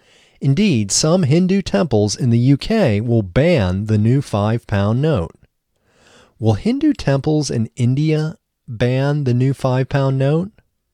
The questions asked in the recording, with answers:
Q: Will Hindu temples in India ban the new 5-pound note?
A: No, Hindu temples in India won't ban the new 5-pound note.